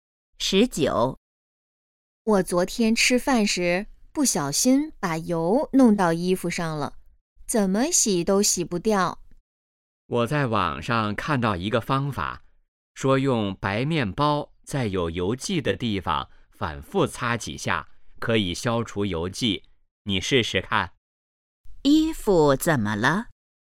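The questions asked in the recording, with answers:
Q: 衣服怎么了?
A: 沾上了油迹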